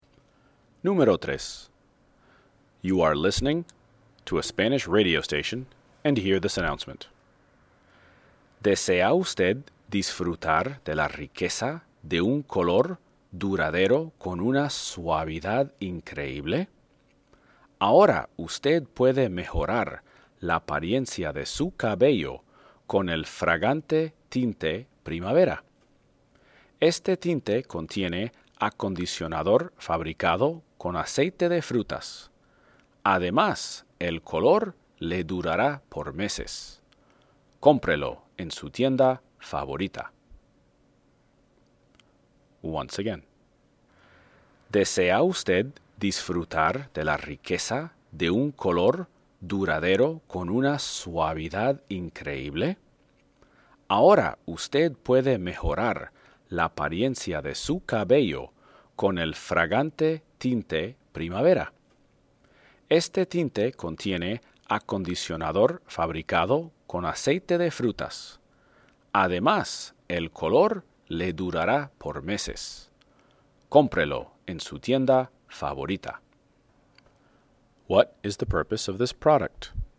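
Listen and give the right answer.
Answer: To color (dye) hair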